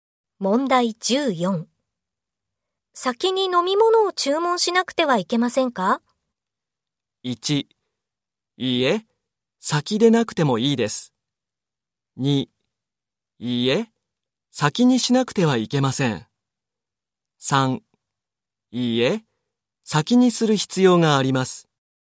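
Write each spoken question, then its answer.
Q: 先に飲み物を注文しなくてはいけませんか?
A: 3: いいえ、先でなくてもいいです。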